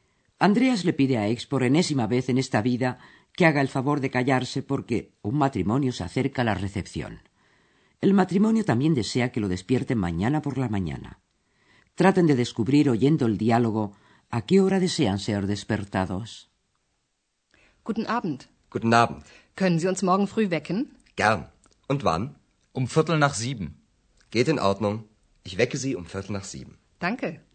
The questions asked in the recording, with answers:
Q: ¿A qué hora desean ser despertados?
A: Para ser exactos, a las siete y cuarto.